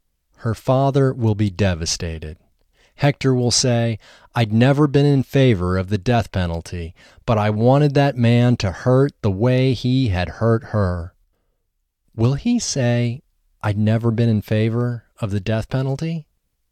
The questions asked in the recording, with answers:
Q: Will he say, "I'd never been in favor of the death penalty"?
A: Yes, he will say, "I'd never been in favor of the death penalty."